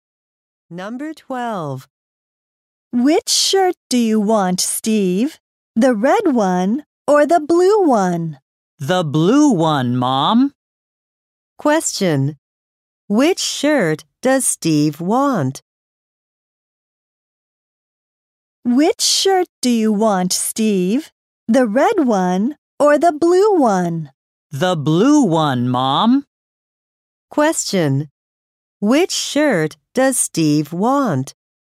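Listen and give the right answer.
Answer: The blue one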